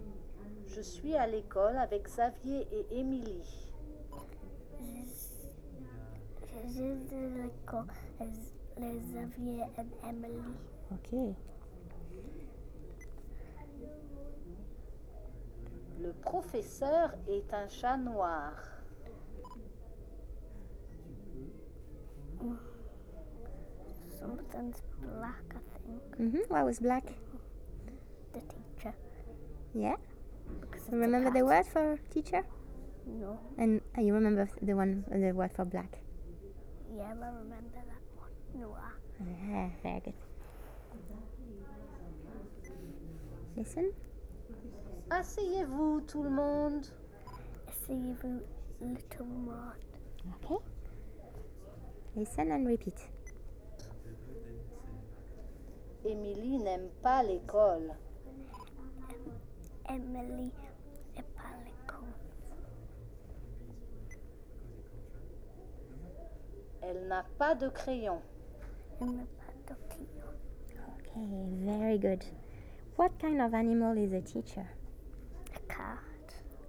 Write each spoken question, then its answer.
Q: What kind of animal is a teacher?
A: A cat.